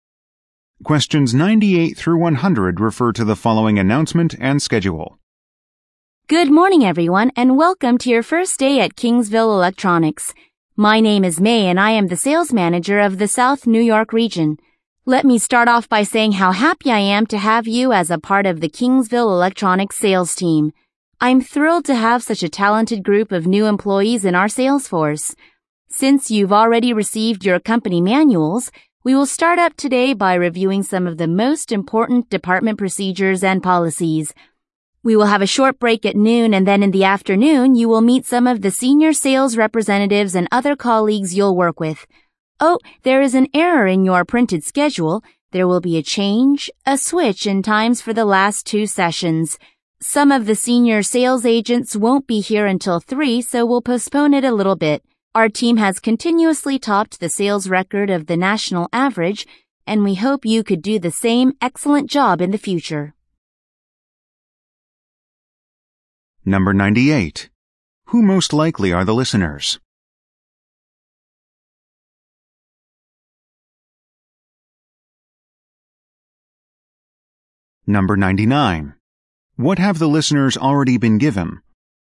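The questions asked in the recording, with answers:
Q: Who most likely are the listeners?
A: New sales employees

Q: What have the listeners already been given?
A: Company manuals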